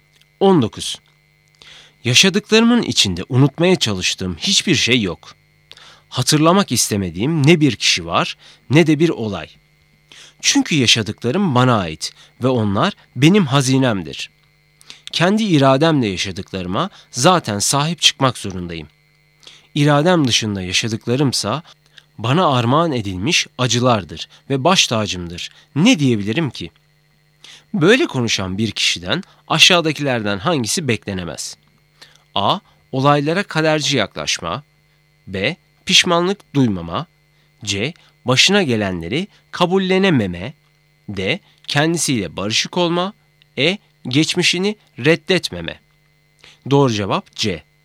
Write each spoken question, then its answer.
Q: Ne diyebilirim ki? Böyle konuşan bir kişiden aşağıdakilerden hangisi beklenemez?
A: Doğru cevap C.